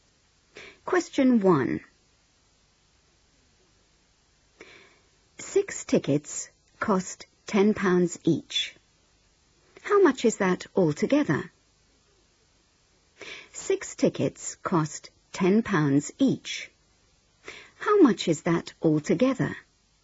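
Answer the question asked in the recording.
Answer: £60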